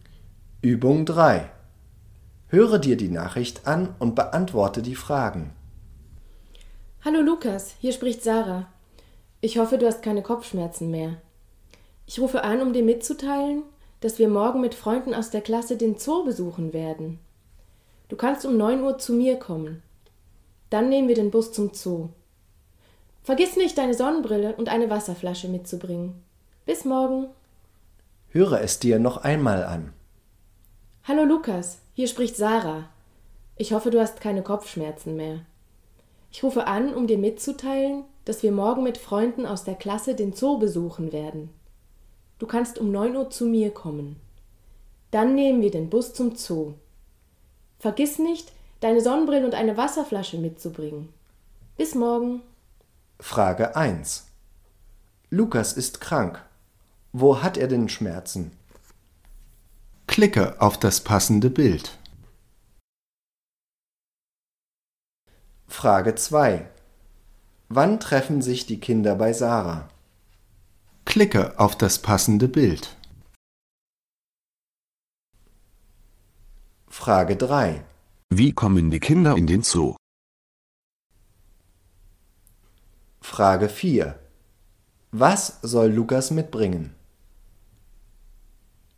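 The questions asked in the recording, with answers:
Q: Lukas ist krank. Wo hat er denn Schmerzen?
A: Kopf (Kopfschmerzen)

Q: Wann treffen sich die Kinder bei Sarah?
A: um 9 Uhr

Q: Wie kommen die Kinder in den Zoo?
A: mit dem Bus

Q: Was soll Lukas mitbringen?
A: Sonnenbrille und Wasserflasche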